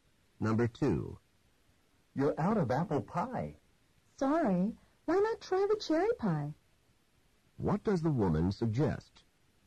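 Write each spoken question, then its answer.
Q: What does the woman suggest?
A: Having the cherry pie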